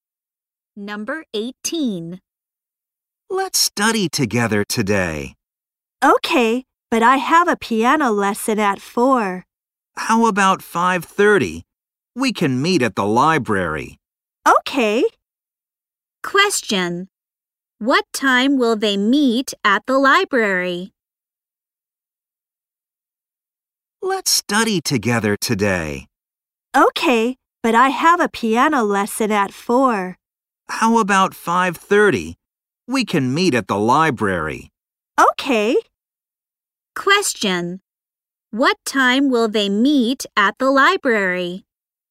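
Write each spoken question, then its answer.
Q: Question. What time will they meet at the library?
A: At 5:30.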